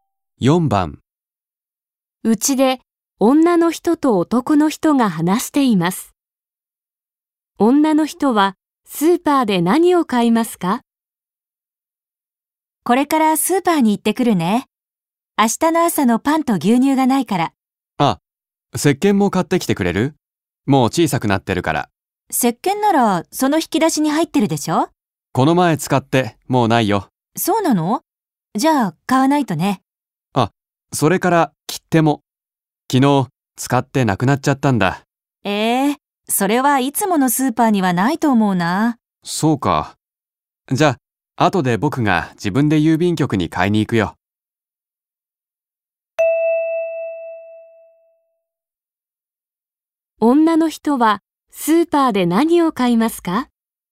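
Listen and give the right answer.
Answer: パンと牛乳と石鹸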